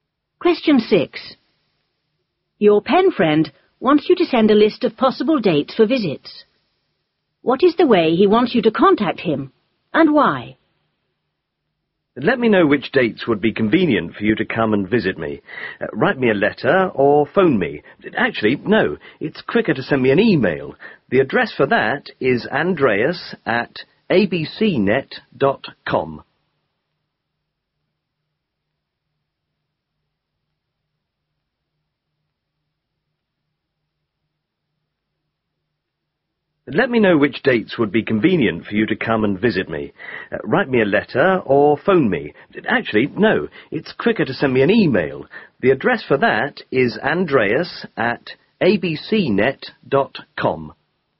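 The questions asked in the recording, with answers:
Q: What is the way he wants you to contact him?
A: By email

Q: And why?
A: Because it's quicker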